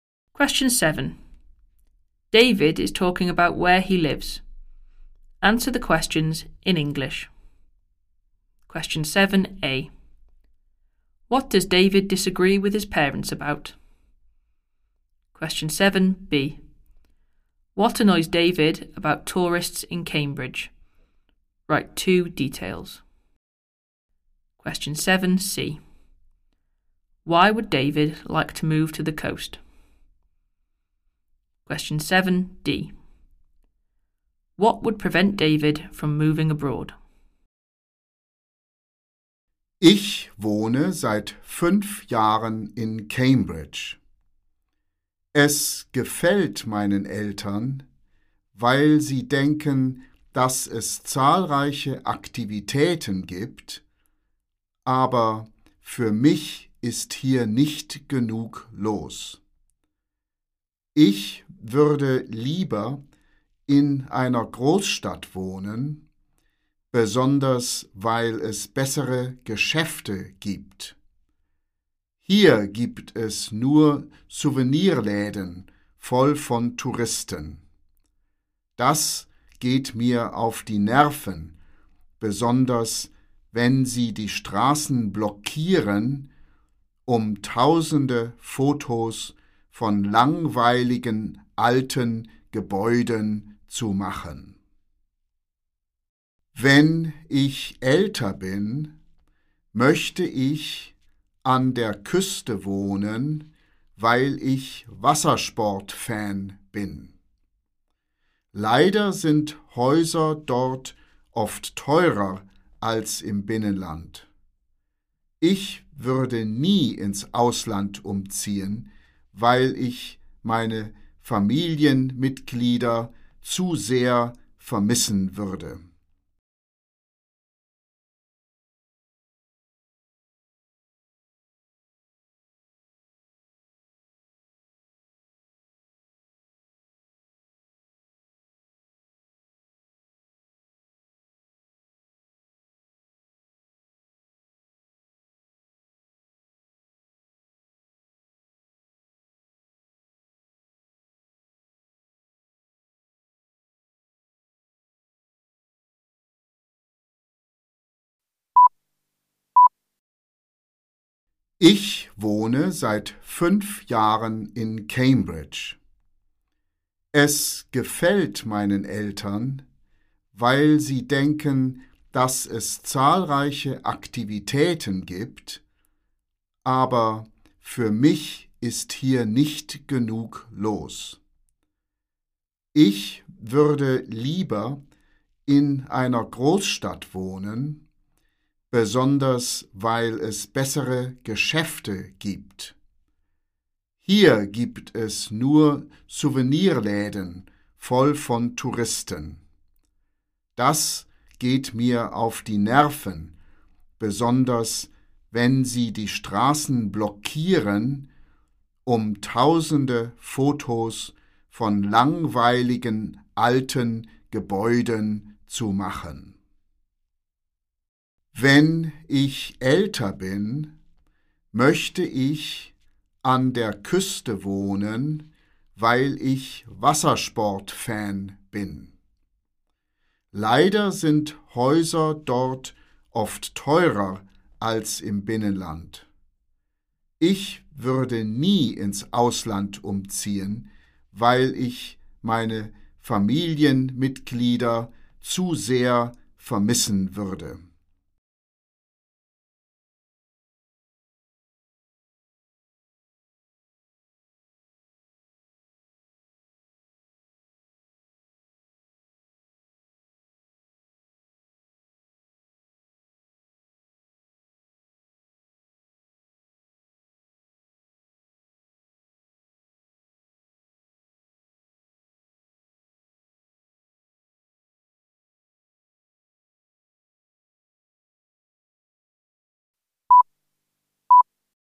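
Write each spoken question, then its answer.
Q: What does David disagree with his parents about?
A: Whether Cambridge has enough to do

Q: What annoys David about tourists in Cambridge?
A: Souvenir shops full of tourists; they block the streets taking photos of old buildings

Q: Why would David like to move to the coast?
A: He is a water sports fan

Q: What would prevent David from moving abroad?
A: He would miss his family too much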